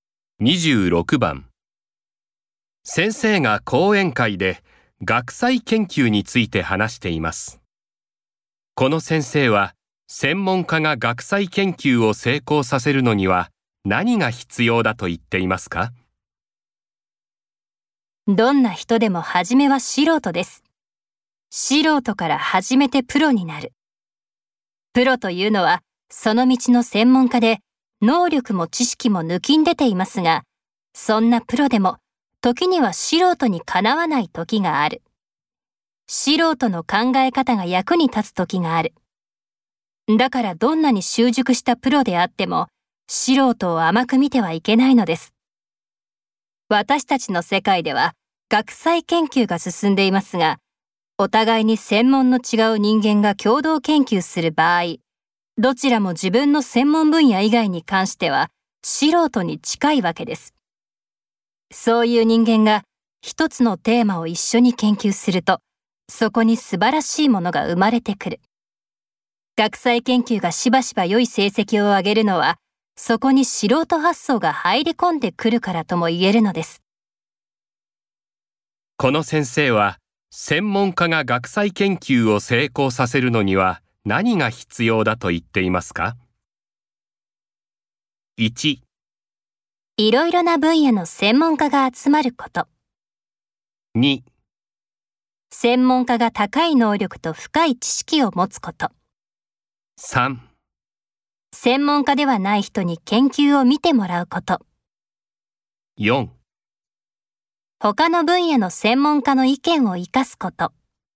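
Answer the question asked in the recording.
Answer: 4: 他の分野の専門家の意見を生かすこと。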